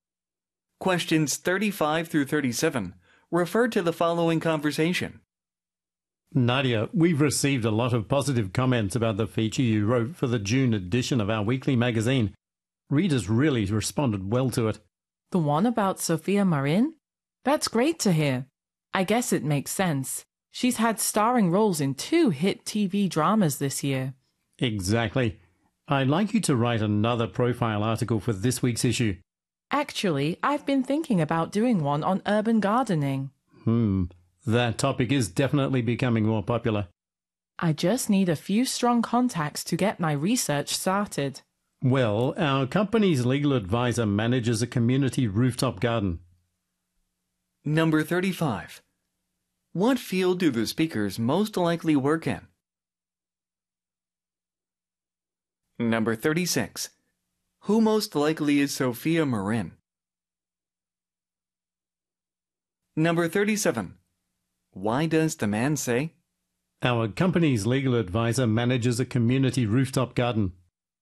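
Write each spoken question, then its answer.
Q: What field do the speakers most likely work in?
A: Magazine publishing

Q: Who most likely is Sophia Marin?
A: A TV actress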